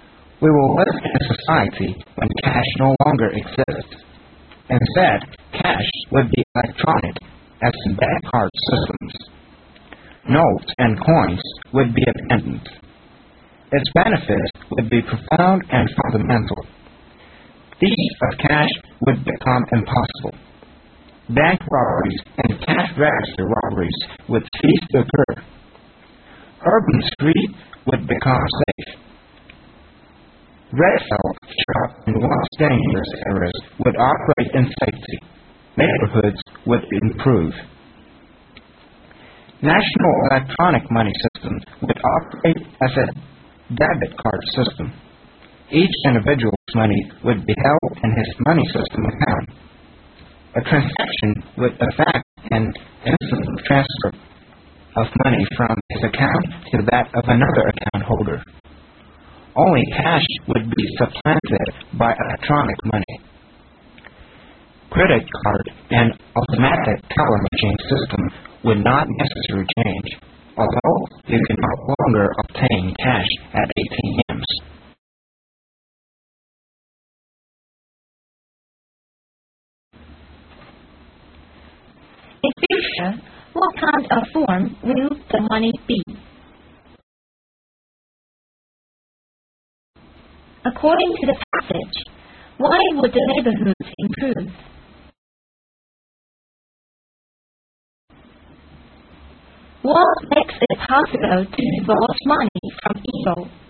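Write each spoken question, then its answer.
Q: In future, what kind of form will the money be?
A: Electronic money, as in bank card systems

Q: According to the passage, why would the neighborhoods improve?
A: Because robberies would stop and streets would become safe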